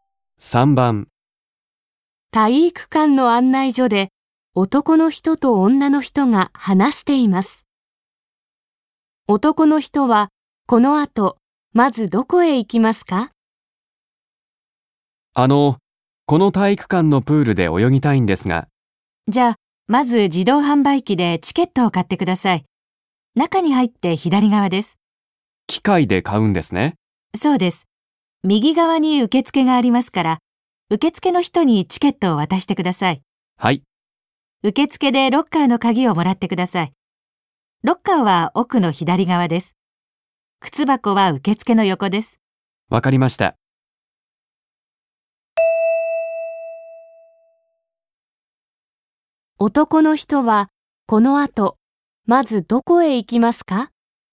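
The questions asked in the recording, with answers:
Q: 男の人はこの後まずどこへ行きますか?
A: 自動販売機(チケットを買いに)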